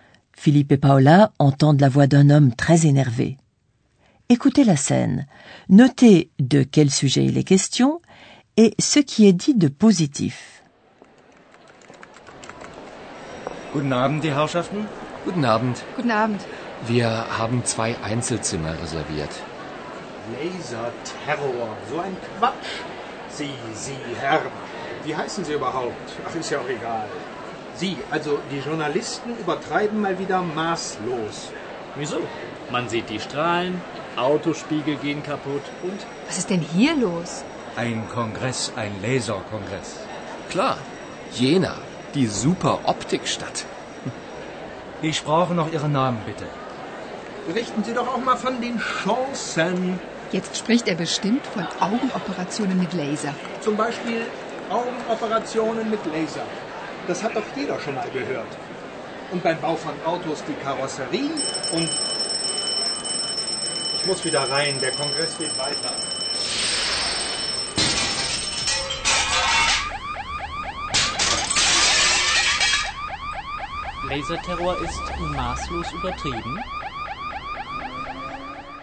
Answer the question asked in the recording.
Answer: Vous avez sûrement compris que le sujet de conversation est le laser et que c'est même le thème du congrès.